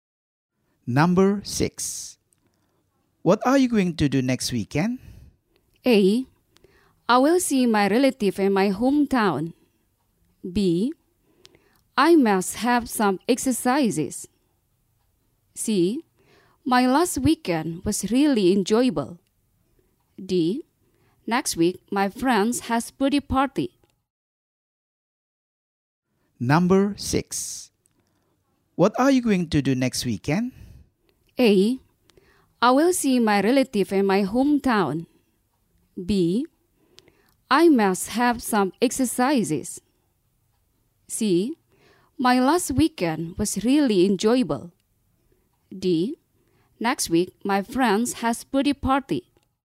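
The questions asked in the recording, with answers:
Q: What are you going to do next weekend?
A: A: I will see my relative in my hometown.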